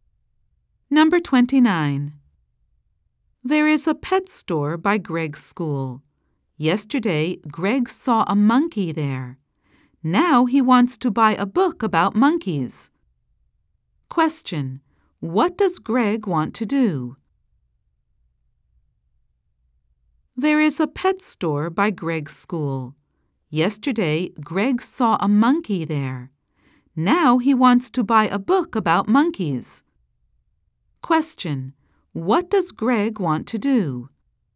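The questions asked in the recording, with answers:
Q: What does Greg want to do?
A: Buy a book about monkeys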